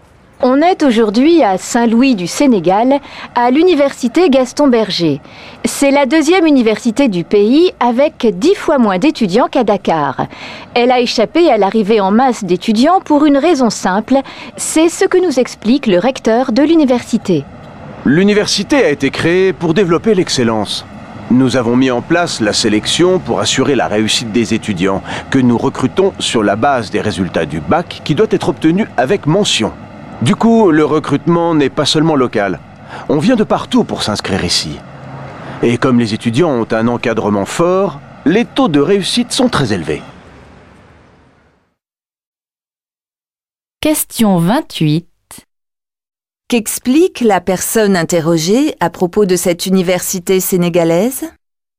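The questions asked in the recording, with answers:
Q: Qu'explique la personne interrogée à propos de cette université sénégalaise ?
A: Elle sélectionne ses étudiants sur la base des résultats du bac, obtenu avec mention.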